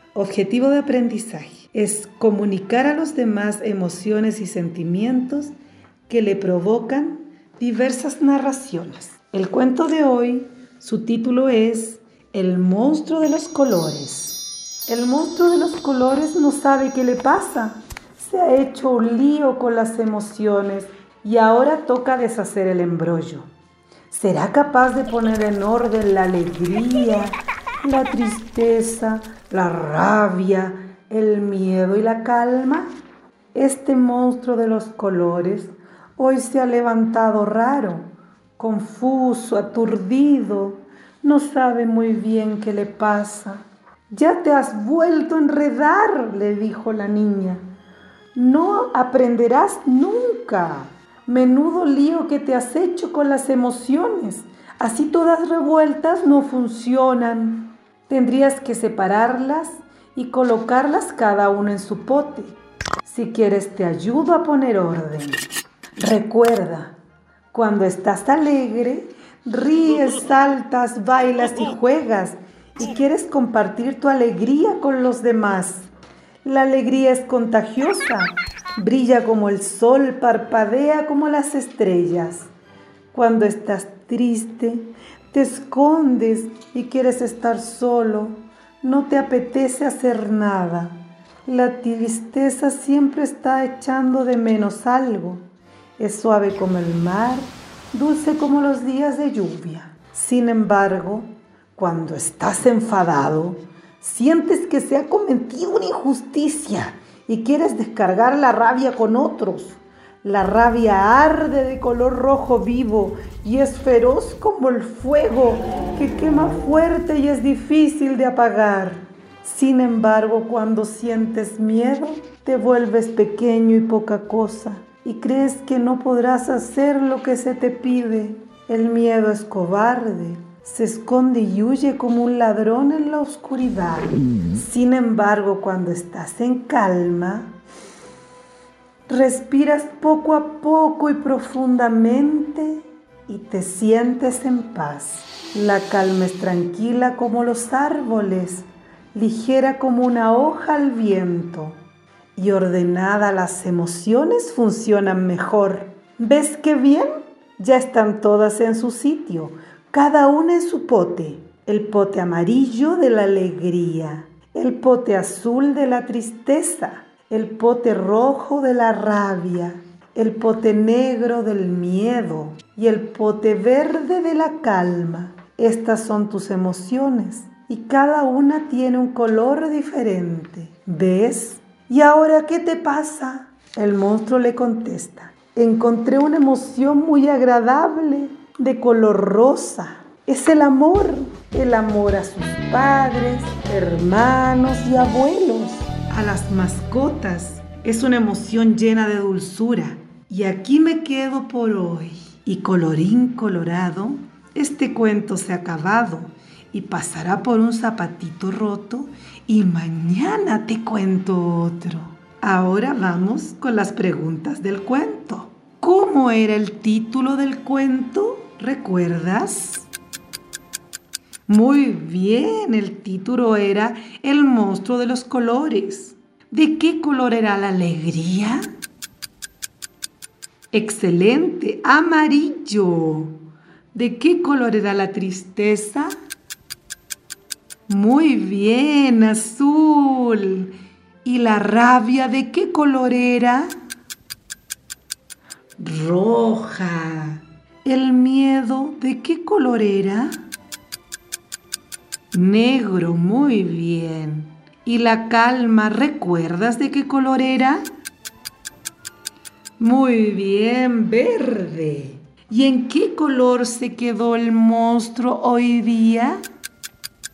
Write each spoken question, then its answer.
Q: ¿Cómo era el título del cuento?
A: Muy bien, el título era El monstruo de los colores.

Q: ¿De qué color era la alegría?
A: ¡Excelente! ¡Amarillo!

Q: ¿De qué color era la tristeza?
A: ¡Muy bien! ¡Azul!

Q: ¿Y la rabia de qué color era?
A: ¡Roja!

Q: ¿El miedo de qué color era?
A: ¡Negro!

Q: ¿Y la calma, recuerdas de qué color era?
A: Muy bien, verde.

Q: ¿Y en qué color se quedó el monstruo hoy día?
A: Excelente, en el color rosa.